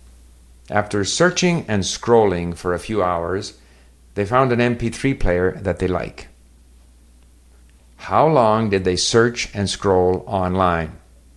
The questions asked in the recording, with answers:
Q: How long did they search and scroll online?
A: A few hours.